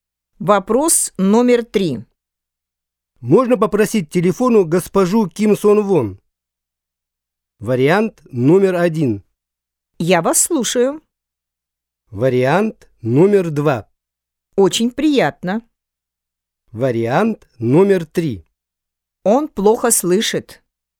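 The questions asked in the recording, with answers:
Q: Можно попросить телефону госпожу Ким Сон Вон?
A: 1: Я вас слушаю.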